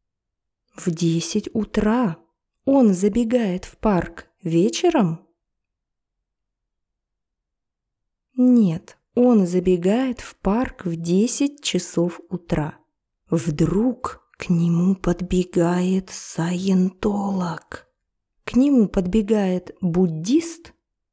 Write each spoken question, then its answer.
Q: К нему подбегает буддист?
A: Нет, к нему подбегает саентолог.